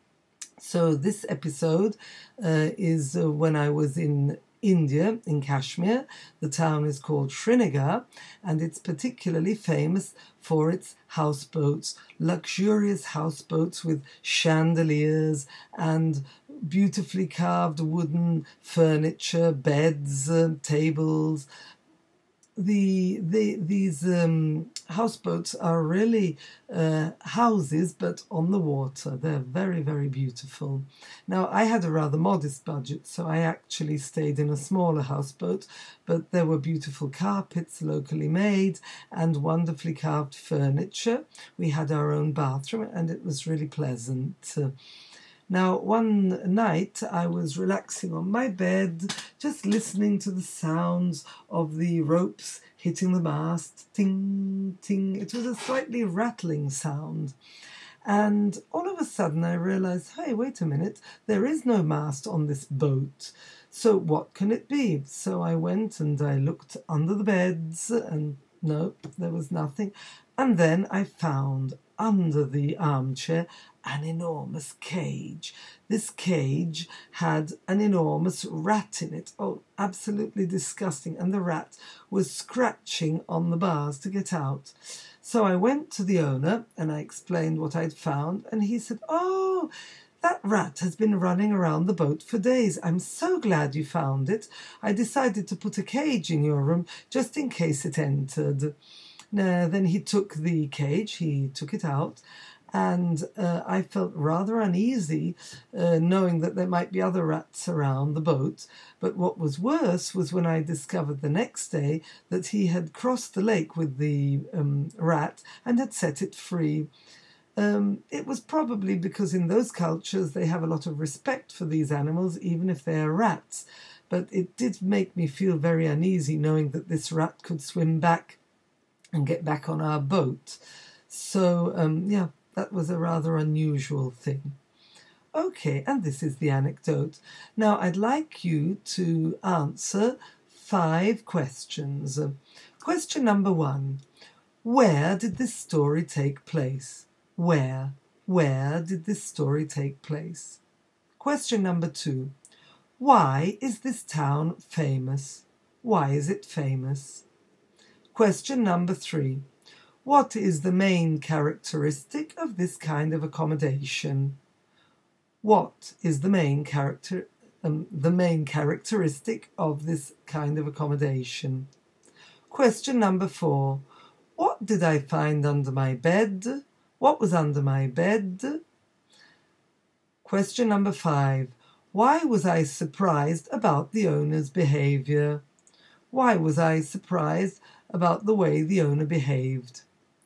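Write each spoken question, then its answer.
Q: Where did this story take place?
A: In Srinagar, Kashmir, India

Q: Why is this town famous?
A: For its luxurious houseboats

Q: What is the main characteristic of this kind of accommodation?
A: They are houses on the water

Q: Why was I surprised about the owner's behaviour?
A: He crossed the lake and set the rat free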